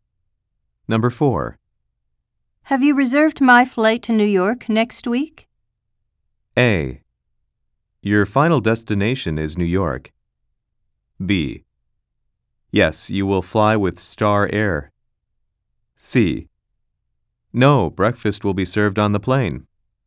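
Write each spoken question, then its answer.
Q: Have you reserved my flight to New York next week?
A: B: Yes, you will fly with Star Air.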